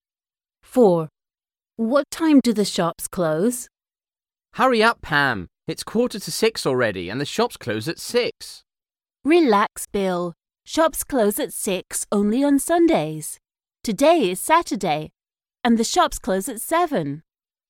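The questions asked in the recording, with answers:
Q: What time do the shops close?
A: at 7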